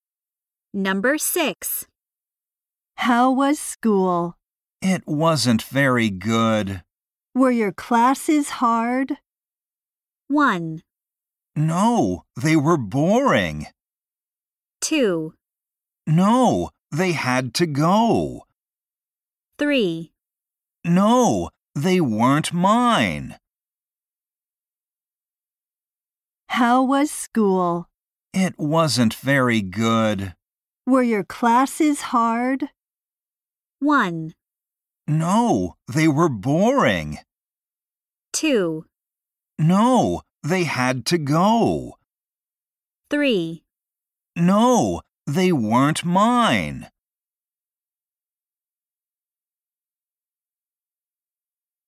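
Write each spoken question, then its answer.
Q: Were your classes hard?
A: 1: No, they were boring.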